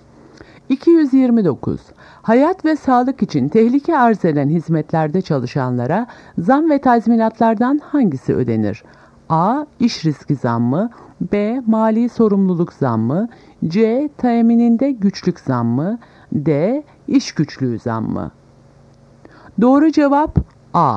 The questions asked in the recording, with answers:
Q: Hayat ve sağlık için tehlike arz eden hizmetlerde çalışanlara zam ve tazminatlardan hangisi ödenir?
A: Doğru cevap A. İş riski zammı.